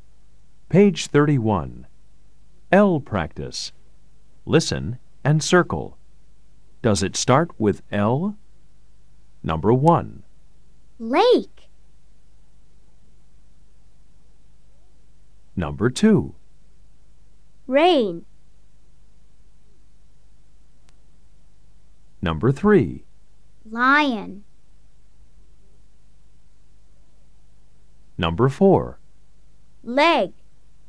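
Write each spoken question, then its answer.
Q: Rain.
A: No

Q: Lion.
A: Yes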